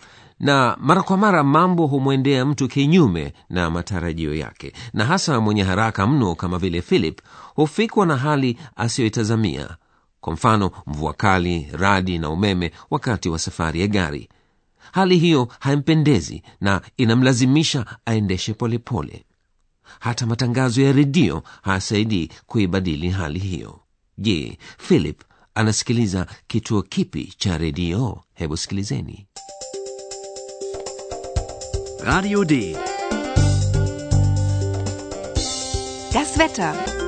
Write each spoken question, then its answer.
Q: je philip anasikiliza kituo kipi cha redio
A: Kituo hicho kilikuwa Radio D